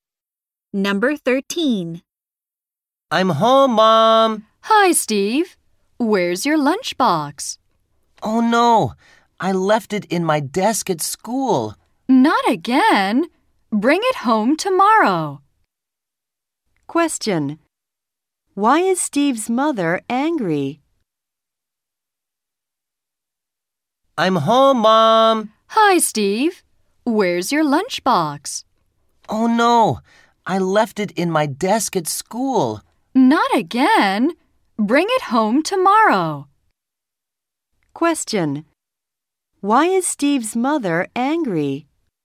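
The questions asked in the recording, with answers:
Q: Why is Steve's mother angry?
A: He left his lunchbox at school again.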